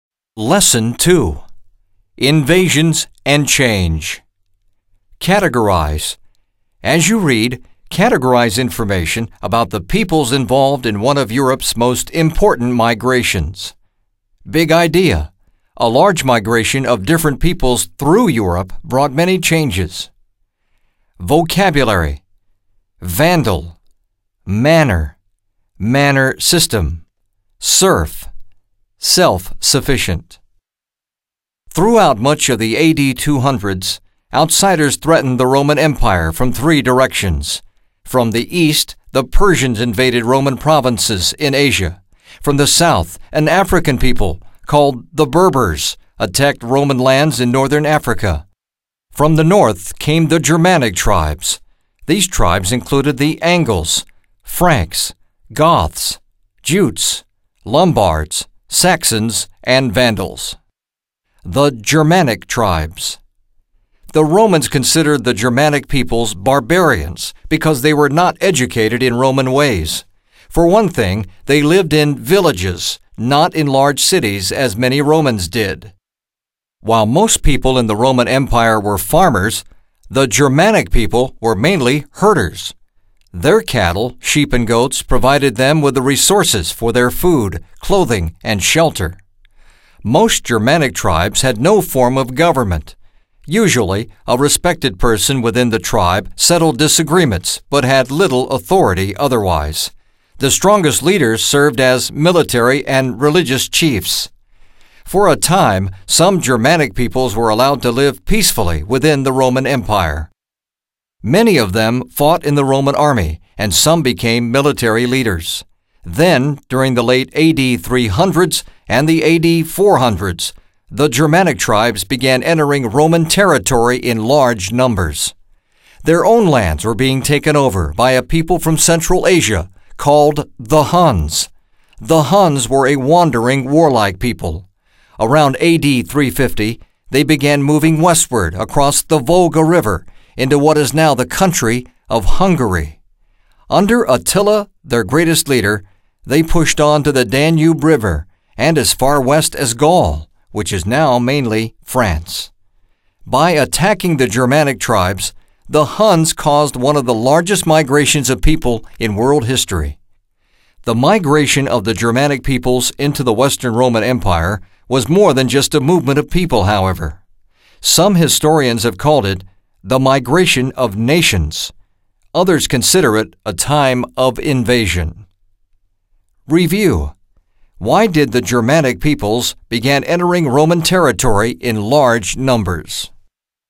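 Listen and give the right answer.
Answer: Their own lands were being taken over by the Huns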